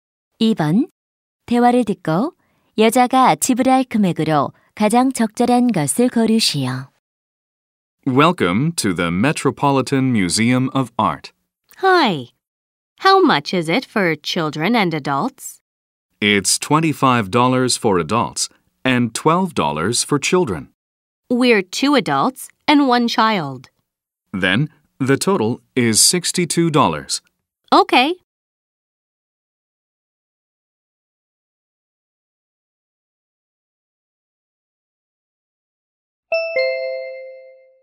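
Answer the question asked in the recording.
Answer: 62달러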